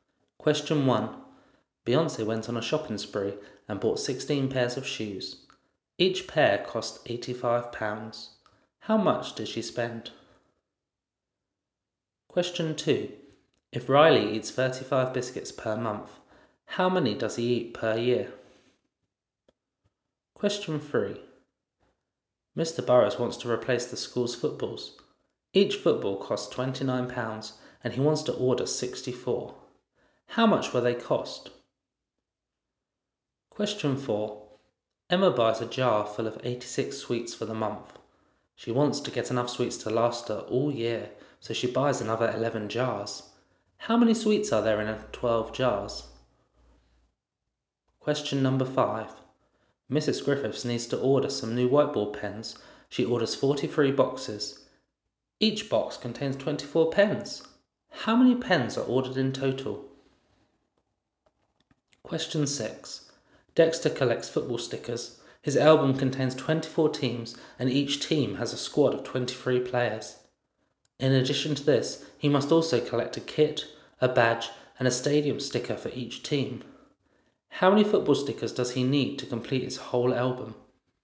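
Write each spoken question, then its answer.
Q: Beyonce went on a shopping spree and bought 16 pairs of shoes. Each pair cost £85. How much did she spend?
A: £1360

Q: If Riley eats 35 biscuits per month, how many does he eat per year?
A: 420

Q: How much will they cost?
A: £1856

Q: How many sweets are there in 12 jars?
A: 1032

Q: How many pens are ordered in total?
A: 1032

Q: How many football stickers does he need to complete his whole album?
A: 624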